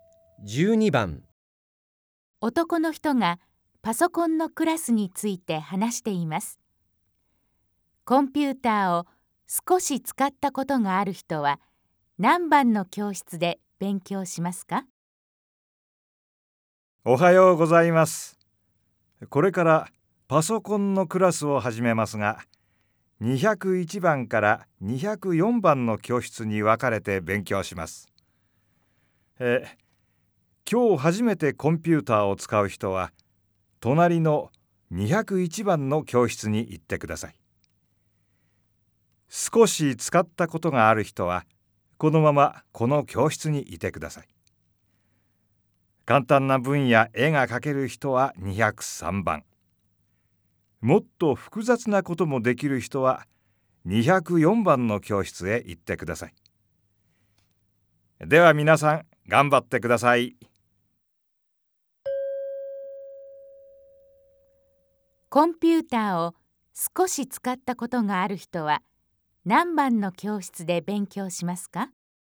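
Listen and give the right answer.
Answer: 202番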